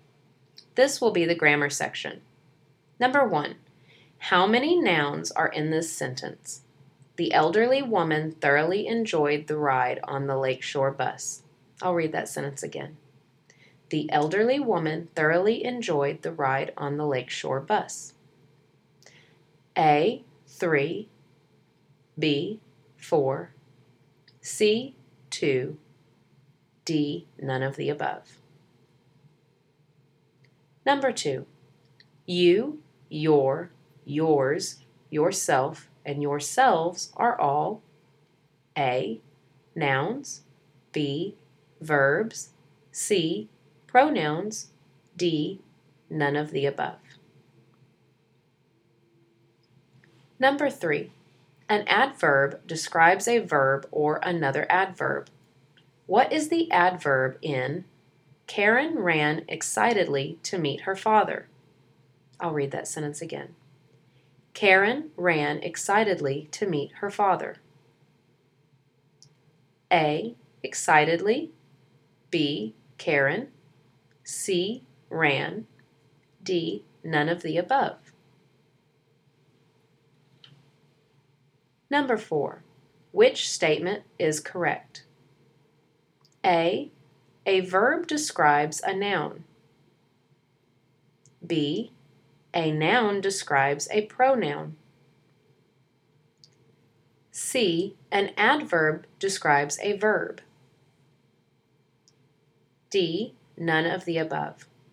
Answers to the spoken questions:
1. The answer to number 1 is A, 3.
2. The answer to number 2 is C, pronouns.
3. The answer to number 3 is A, excitedly.
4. The answer to number 4 is C.